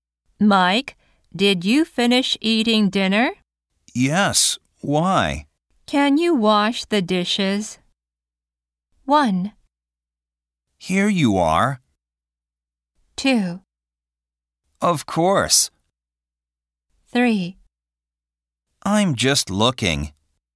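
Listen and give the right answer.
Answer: 2: Of course.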